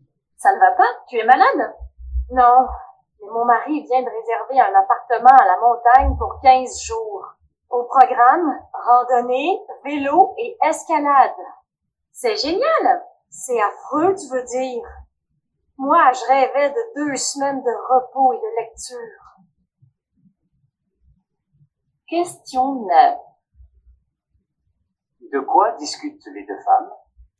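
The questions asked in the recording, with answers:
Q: De quoi discutent les deux femmes?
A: Des vacances à la montagne que le mari de l'une d'elles a réservées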